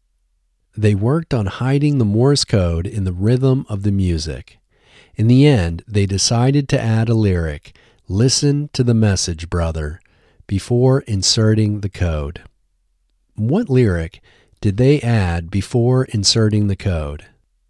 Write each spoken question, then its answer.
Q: What lyric did they add before inserting the code?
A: They added the lyric, "Listen to the message, brother," before inserting the code.